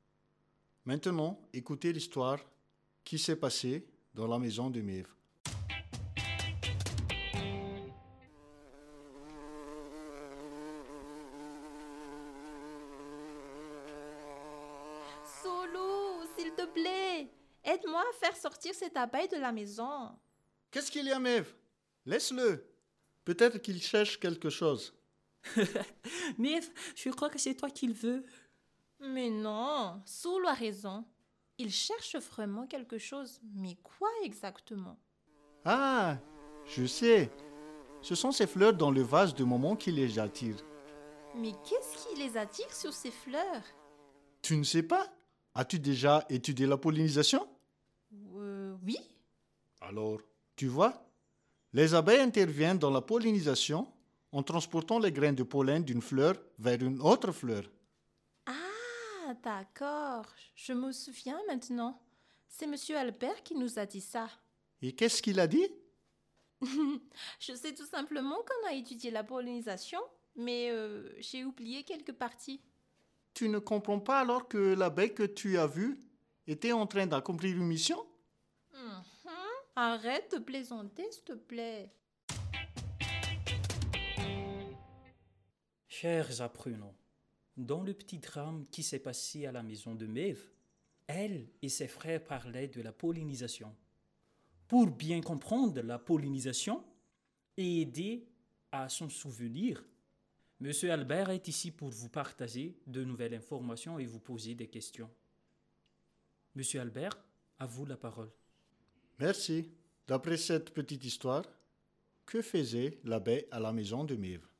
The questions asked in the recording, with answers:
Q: D'après cette petite histoire, que faisait l'abeille à la maison de Mev?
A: Bien, l'abeille était en train de chercher des fleurs pour collecter des nectars et il effectue la pollinisation.